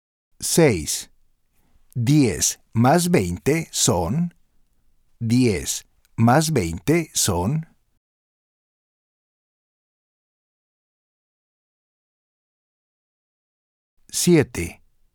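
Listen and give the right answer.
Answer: 30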